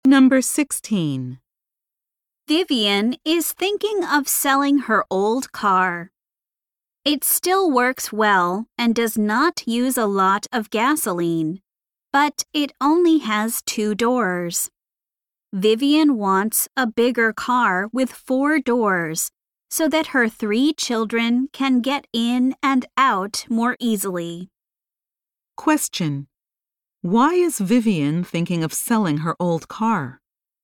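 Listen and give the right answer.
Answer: She wants a bigger car with 4 doors for her 3 children.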